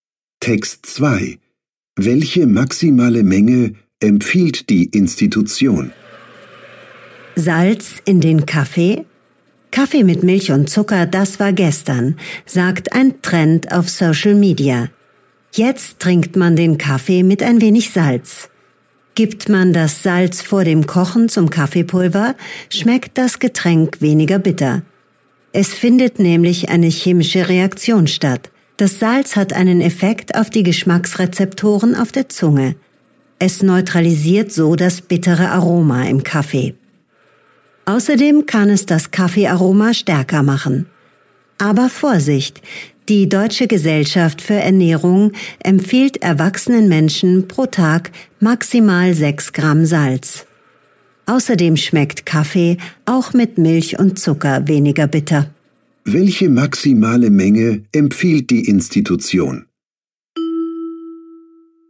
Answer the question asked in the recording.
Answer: Die Deutsche Gesellschaft für Ernährung empfiehlt erwachsenen Menschen pro Tag maximal 6 Gramm Salz.